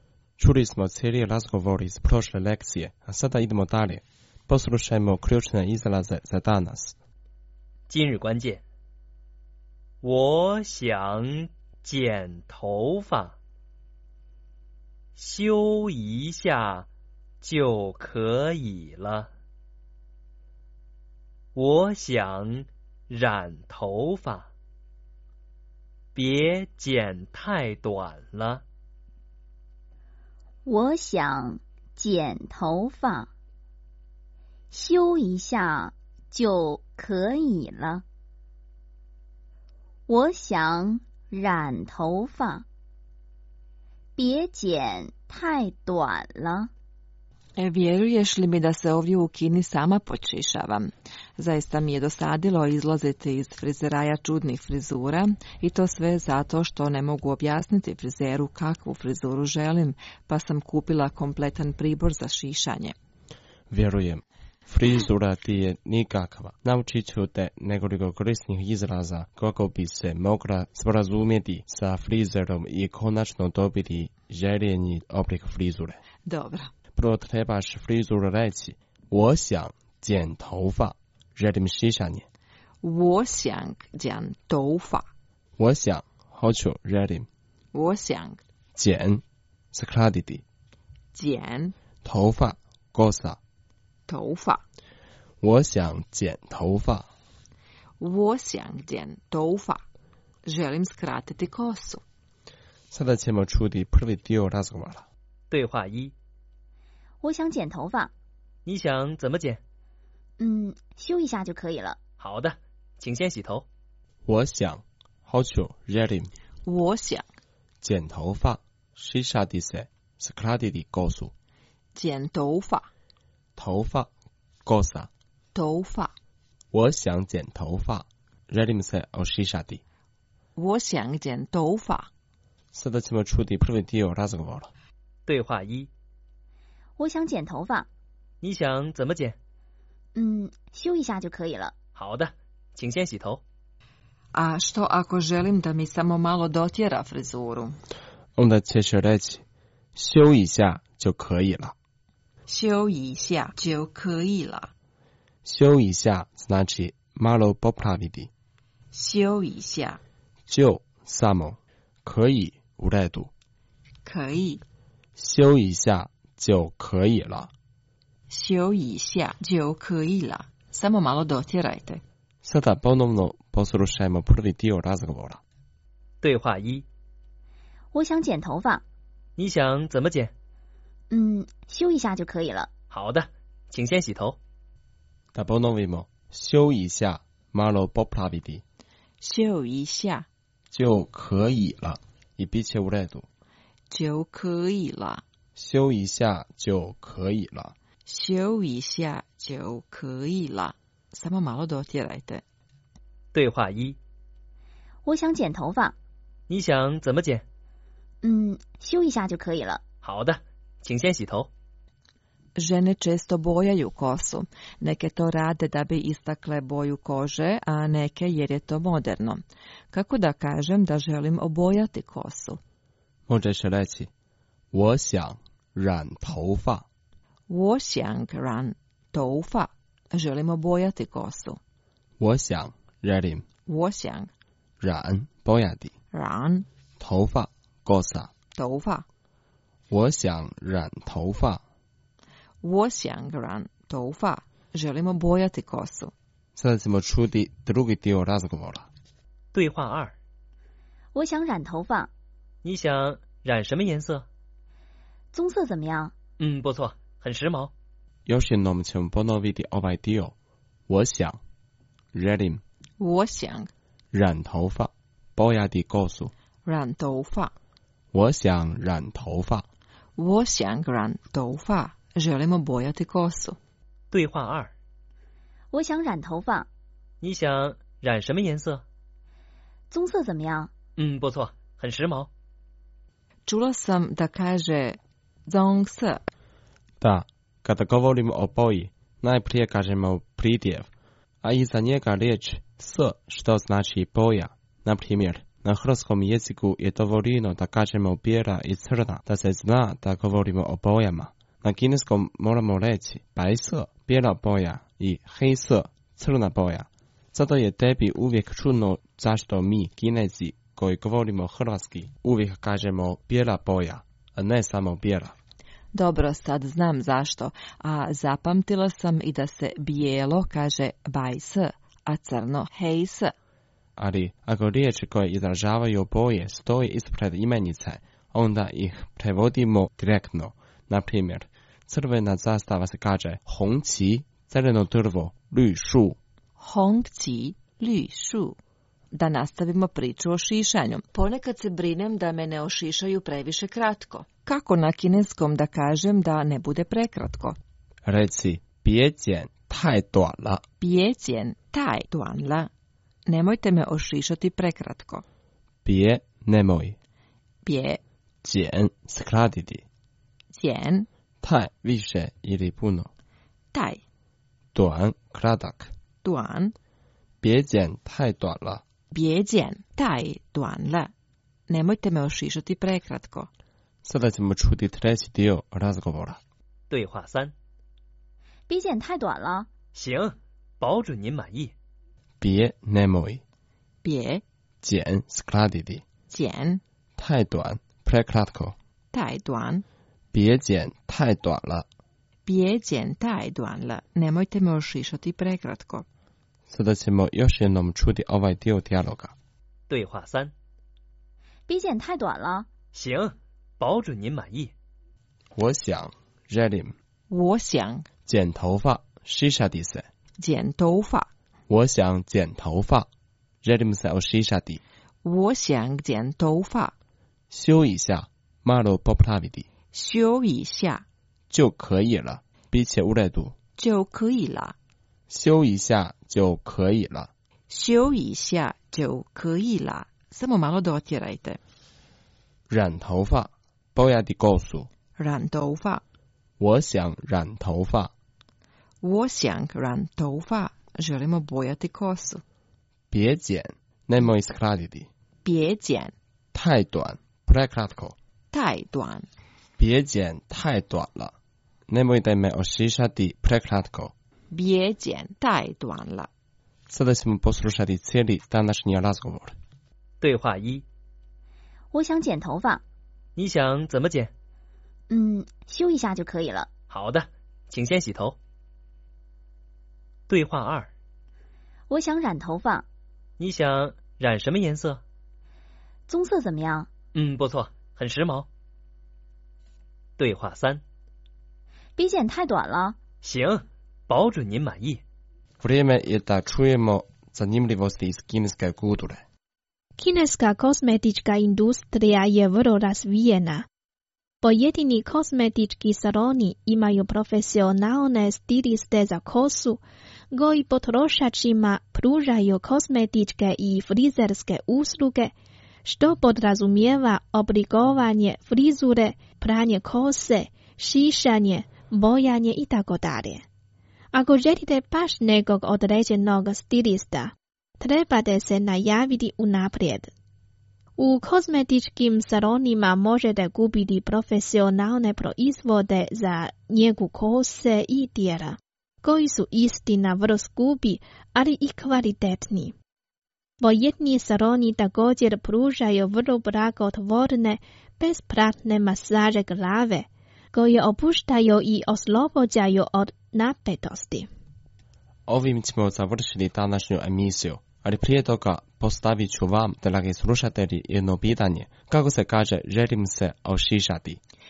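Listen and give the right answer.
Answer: 我想剪头发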